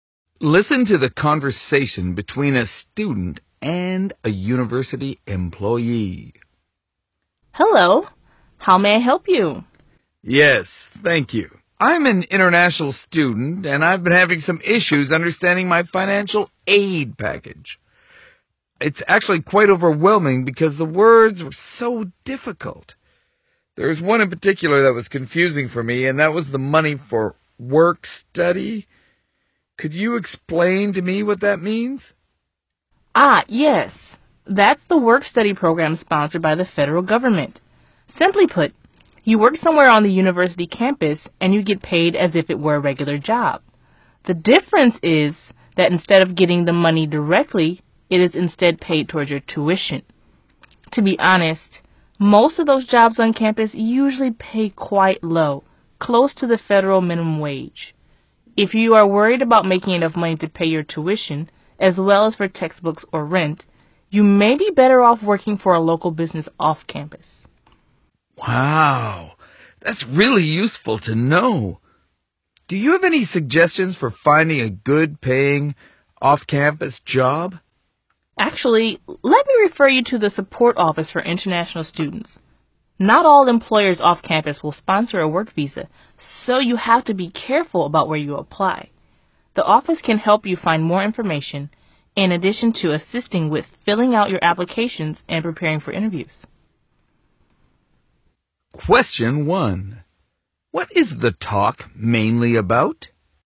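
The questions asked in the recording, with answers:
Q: What is the talk mainly about?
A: An international student asking about work-study in a financial aid package and about off-campus jobs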